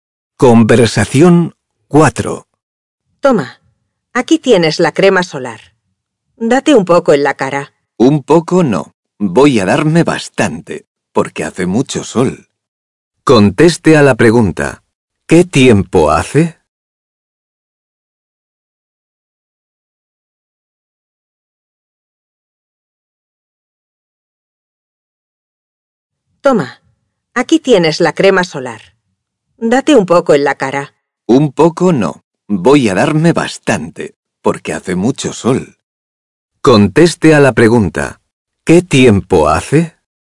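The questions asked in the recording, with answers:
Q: ¿Qué tiempo hace?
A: Hace mucho sol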